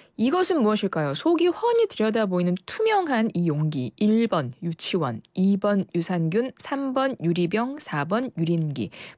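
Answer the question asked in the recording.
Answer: 3: 유리병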